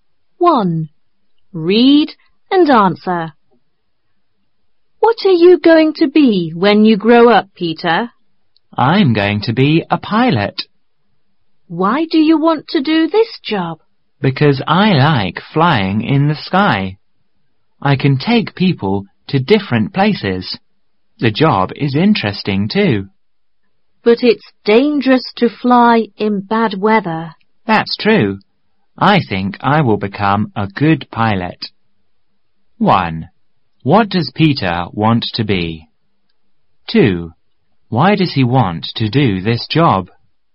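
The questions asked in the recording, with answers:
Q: What does Peter want to be?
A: A pilot.

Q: Why does he want to do this job?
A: Because he likes flying in the sky, he can take people to different places, and the job is interesting.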